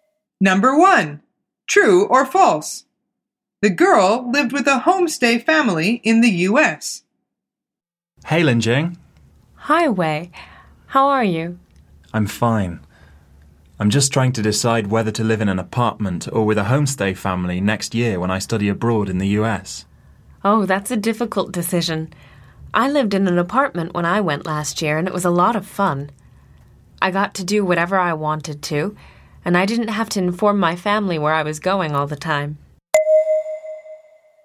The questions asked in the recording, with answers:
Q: The girl lived with a homestay family in the US.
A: The answer is false. She says, I lived in an apartment when I went last year,